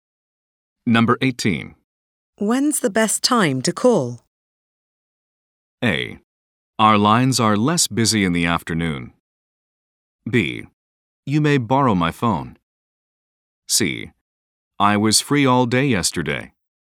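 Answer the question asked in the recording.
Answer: A: Our lines are less busy in the afternoon.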